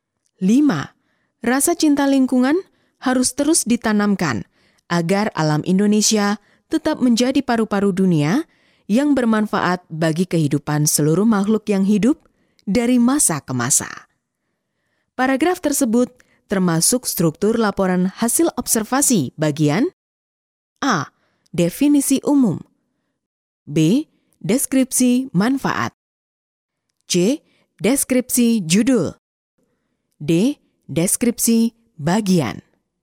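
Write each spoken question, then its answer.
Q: Paragraf tersebut termasuk struktur laporan hasil observasi bagian A.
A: B: Deskripsi manfaat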